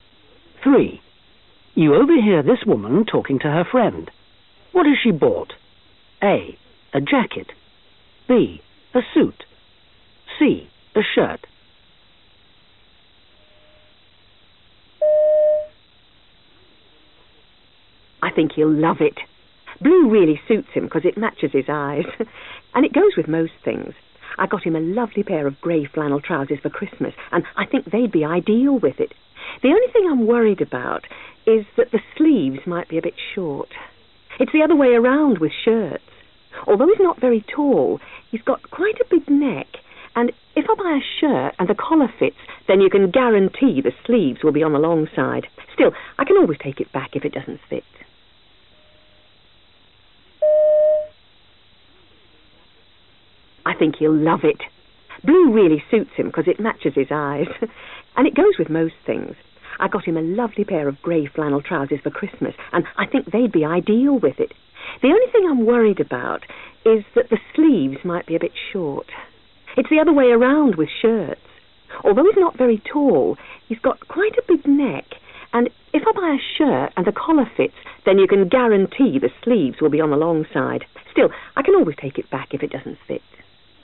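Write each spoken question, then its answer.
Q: What has she bought? A. A jacket. B. A suit. C. A shirt.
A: A: A jacket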